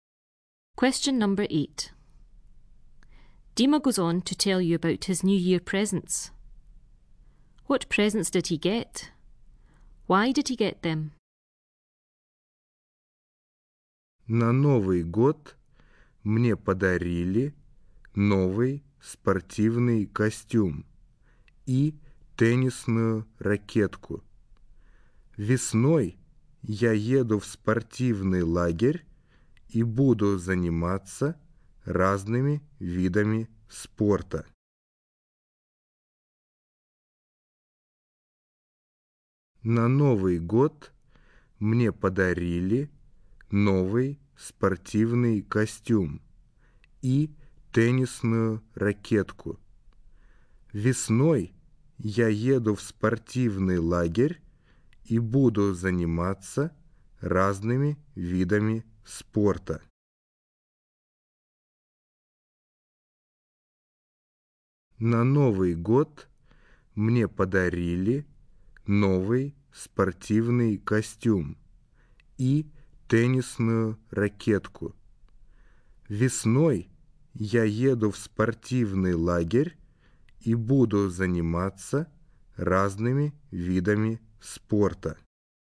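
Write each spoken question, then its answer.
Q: What presents did he get?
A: A new tracksuit and a tennis racket

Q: Why did he get them?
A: He is going to a sports camp in spring to do various sports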